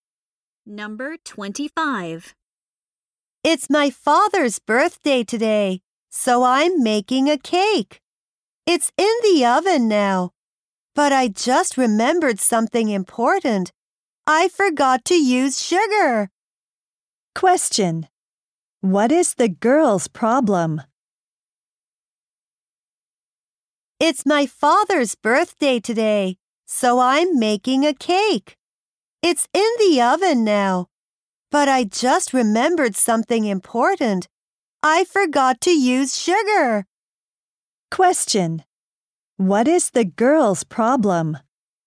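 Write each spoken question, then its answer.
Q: What is the girl's problem?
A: She forgot to use sugar in the cake.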